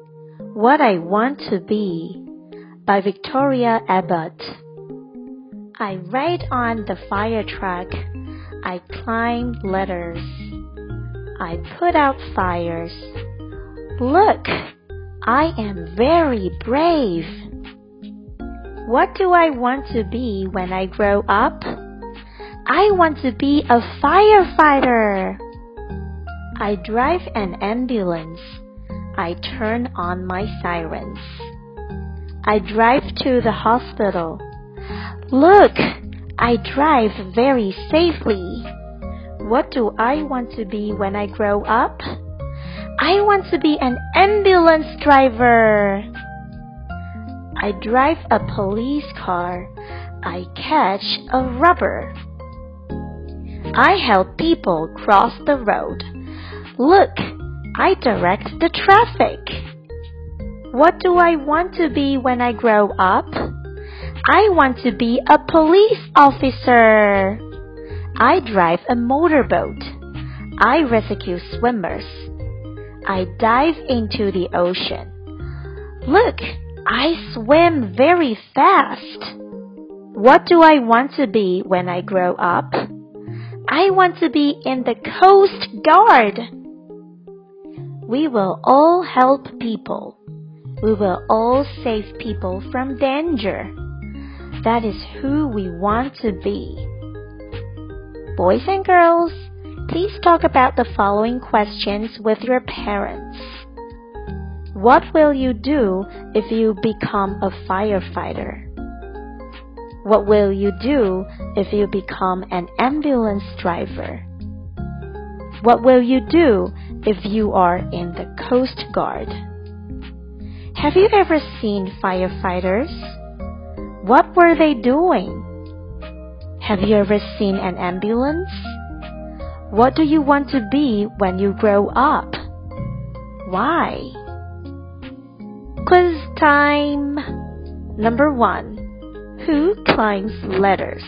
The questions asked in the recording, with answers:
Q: Who climbs ladders?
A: The firefighter.